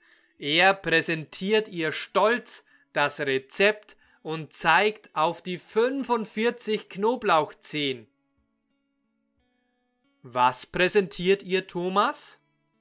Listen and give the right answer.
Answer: Das Rezept. Er präsentiert ihr stolz das Rezept.